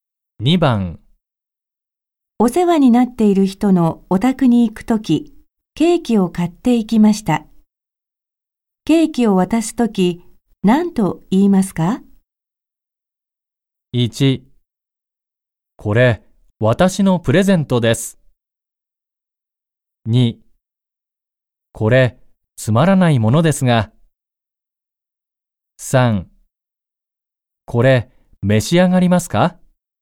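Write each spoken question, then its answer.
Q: ケーキを渡すとき、何と言いますか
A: 2: これ、つまらないものですが。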